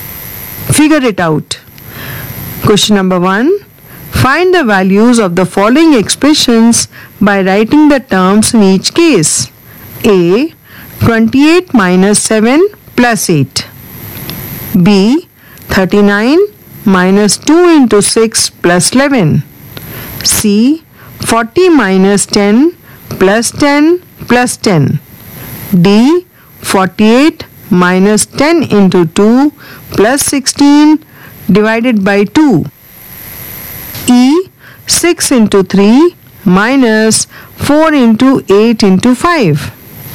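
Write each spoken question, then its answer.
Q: A. 28 minus 7 plus 8.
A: 29

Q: 39 minus 2 into 6 plus 11.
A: 38

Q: C. 40 minus 10 plus 10 plus 10.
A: 50

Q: D. 48 minus 10 into 2 plus 16 divided by 2.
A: 36

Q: E. 6 into 3 minus 4 into 8 into 5.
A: -142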